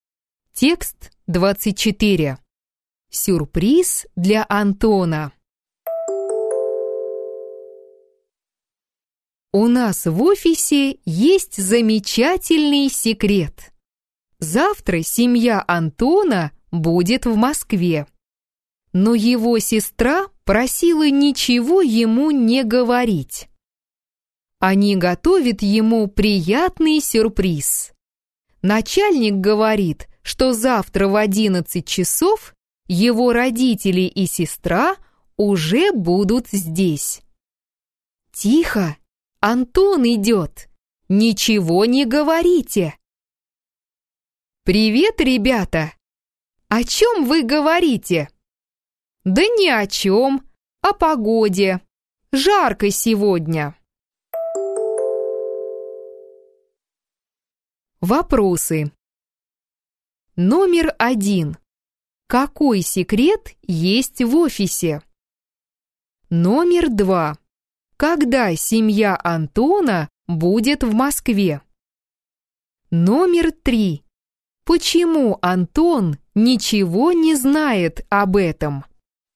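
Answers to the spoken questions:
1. Завтра семья Антона будет в Москве
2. Завтра в 11 часов
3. Сестра просила ничего ему не говорить — готовят сюрприз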